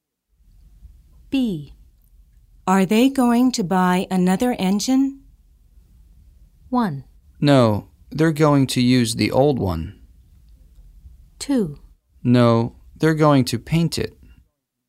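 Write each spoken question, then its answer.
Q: Are they going to buy another engine?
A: 1: No, they're going to use the old one.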